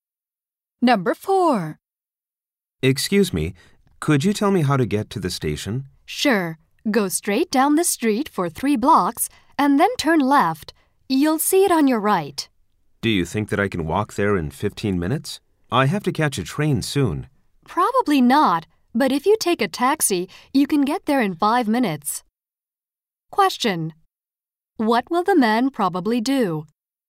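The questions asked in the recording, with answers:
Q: What will the man probably do?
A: Take a taxi to the station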